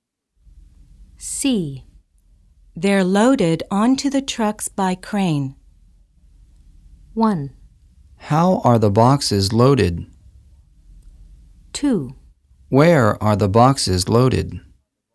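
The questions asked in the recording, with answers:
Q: They're loaded onto the trucks by crane.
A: 1: How are the boxes loaded?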